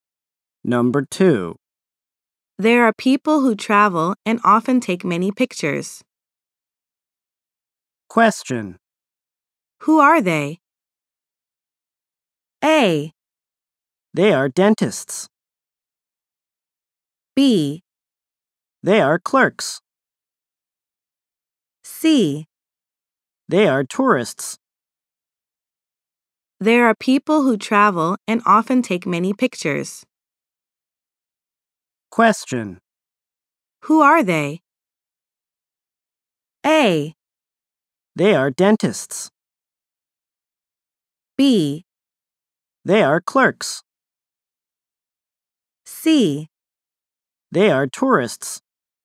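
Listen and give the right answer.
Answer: C: They are tourists.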